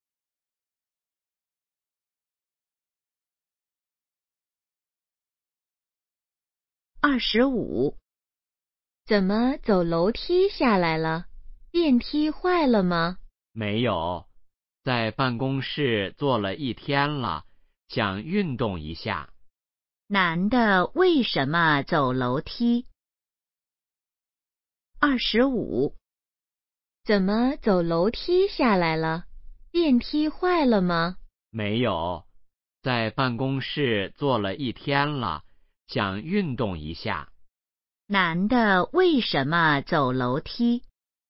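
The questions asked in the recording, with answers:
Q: 男的为什么走楼梯?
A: 想运动一下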